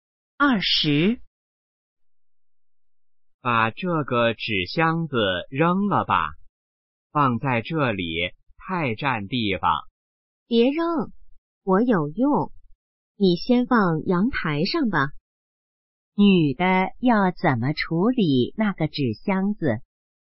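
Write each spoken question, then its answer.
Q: 女的要怎么处理那个纸箱子?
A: 先放在阳台上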